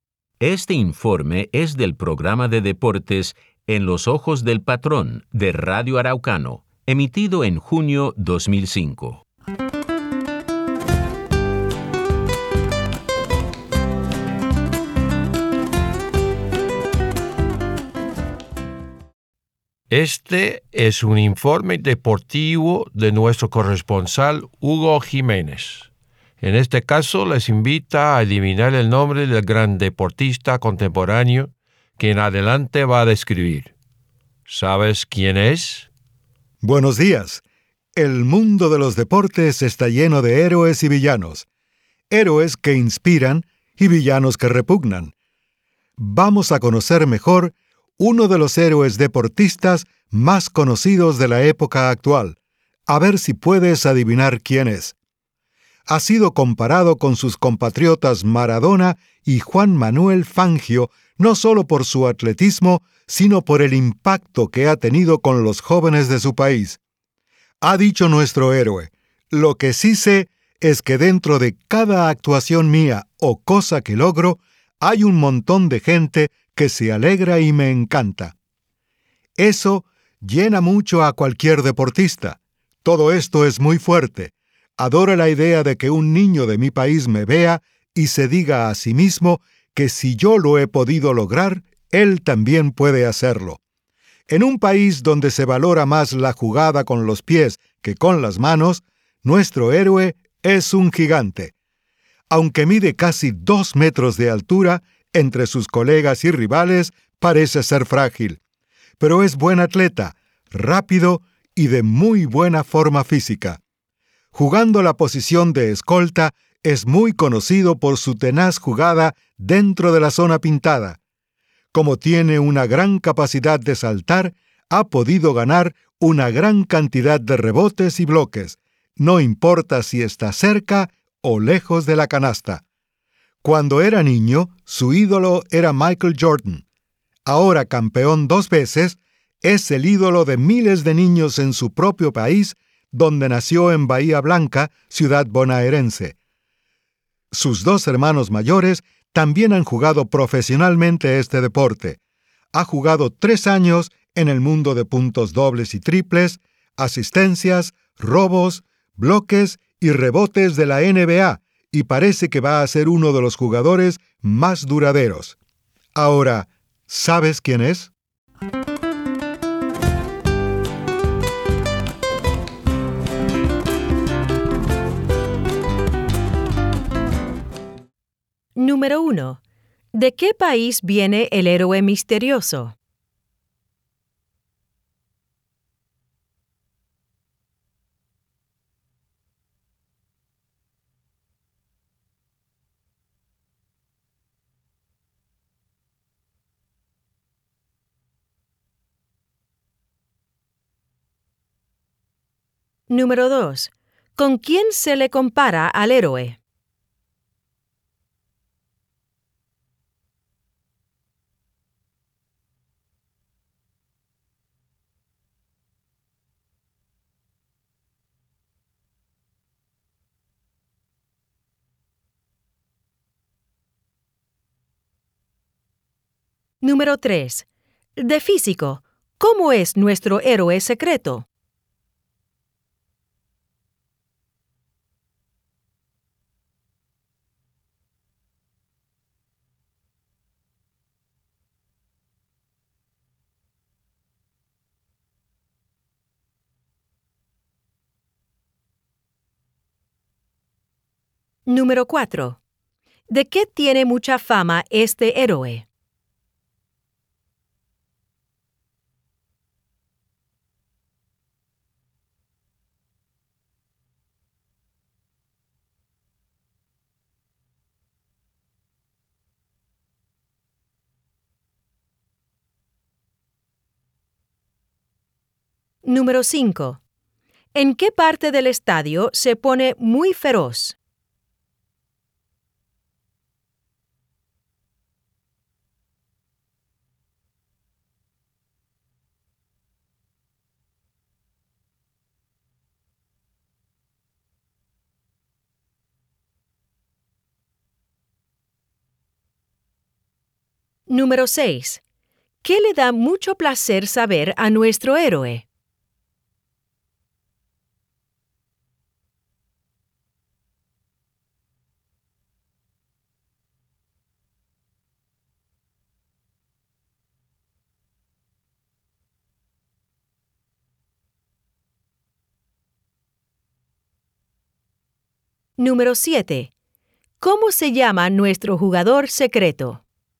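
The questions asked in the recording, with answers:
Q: ¿De qué país viene el héroe misterioso?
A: De Argentina

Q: ¿Con quién se le compara al héroe?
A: Con Maradona y Juan Manuel Fangio

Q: De físico, ¿cómo es nuestro héroe secreto?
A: Mide casi 2 metros, parece frágil, pero es rápido y de muy buena forma física

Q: ¿En qué parte del estadio se pone muy feroz?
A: En la zona pintada

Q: ¿Qué le da mucho placer saber a nuestro héroe?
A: Que mucha gente se alegra con sus logros y que los niños de su país se inspiran en él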